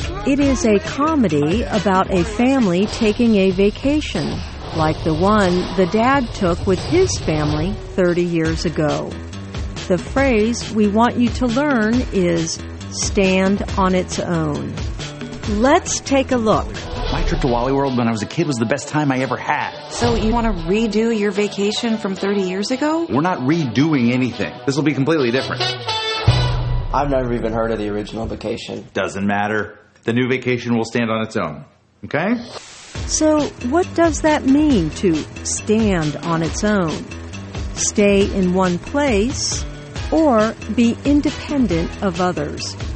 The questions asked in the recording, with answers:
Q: So what does that mean to stand on its own?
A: To stand on its own means to be independent.